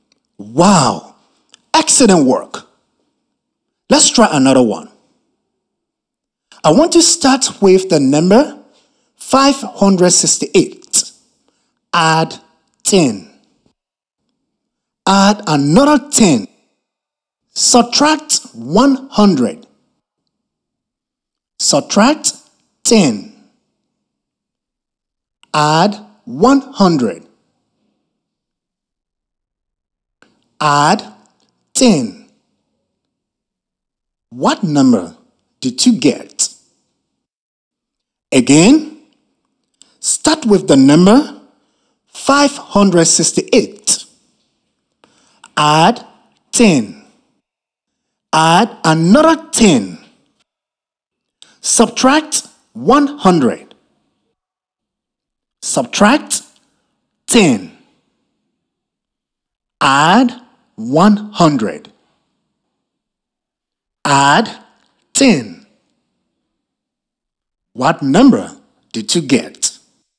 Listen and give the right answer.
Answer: And adding 10 makes 588